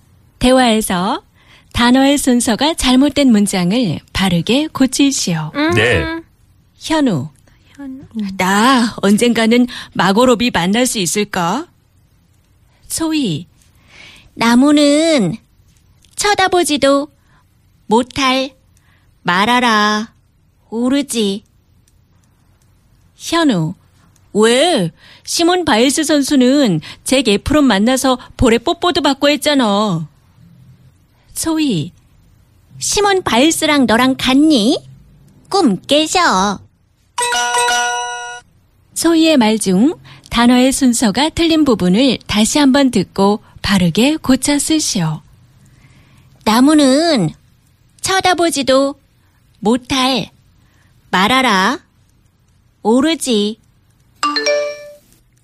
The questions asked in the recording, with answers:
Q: 소희의 말 중 단어의 순서가 틀린 부분을 다시 한번 듣고 바르게 고쳐 쓰시오.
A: 오르지 못할 나무는 쳐다보지도 말아라.